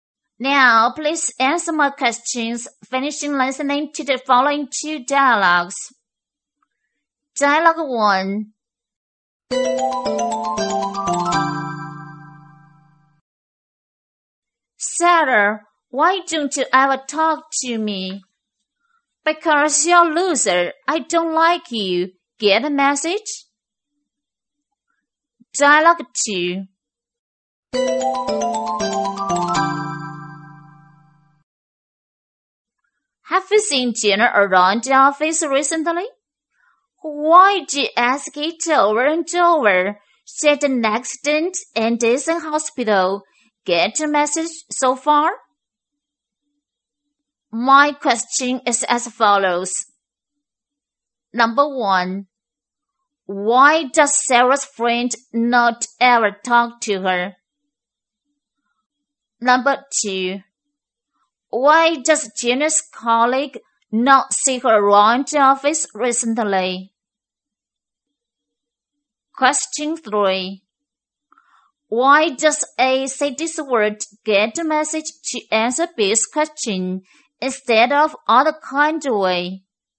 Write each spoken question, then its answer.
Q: Why does Jenna's colleague not see her around the office recently?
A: Because Jenna had an accident and was in hospital.